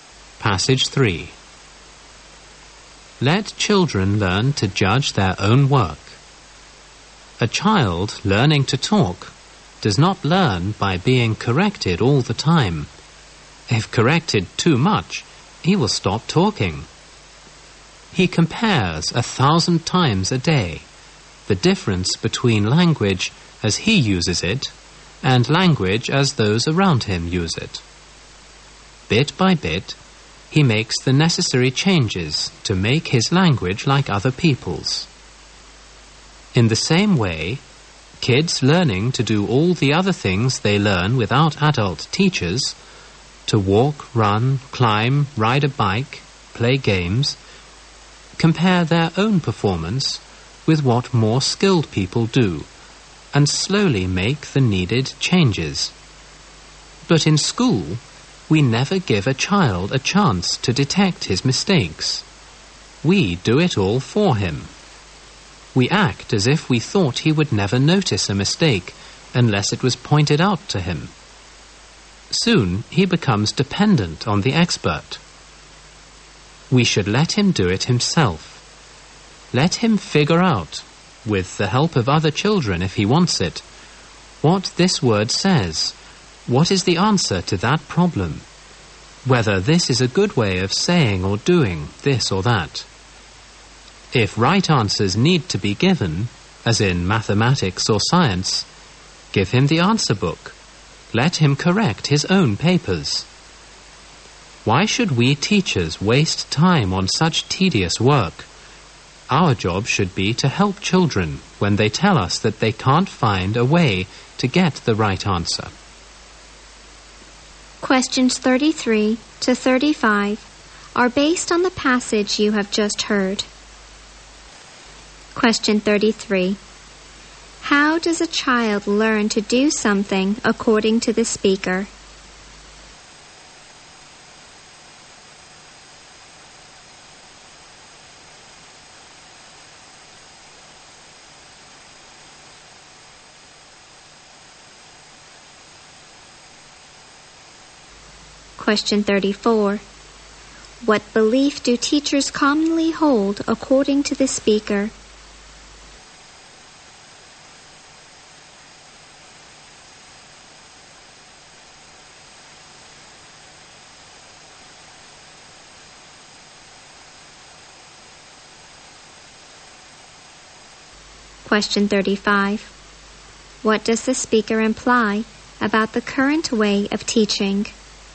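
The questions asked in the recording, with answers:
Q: How does a child learn to do something according to the speaker?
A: By comparing his performance with that of more skilled people and slowly making changes

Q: What belief do teachers commonly hold according to the speaker?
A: Children won't notice mistakes unless someone points them out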